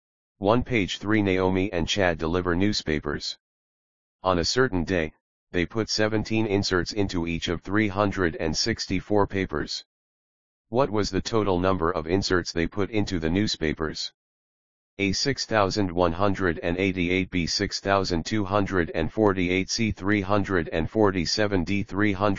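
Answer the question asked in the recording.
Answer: A: 6,188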